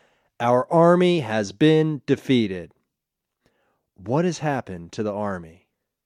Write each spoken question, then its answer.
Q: What has happened to the army?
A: The army has been defeated.